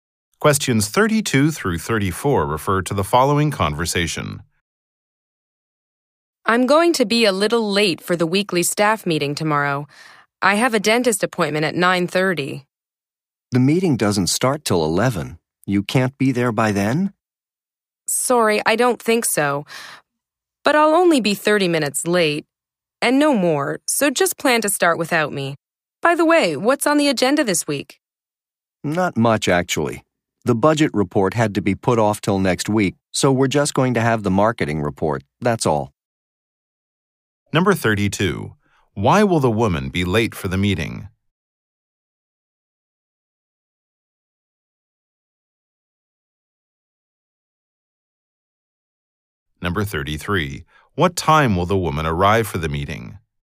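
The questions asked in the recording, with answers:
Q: Why will the woman be late for the meeting?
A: She has a dentist appointment

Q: What time will the woman arrive for the meeting?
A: 11:30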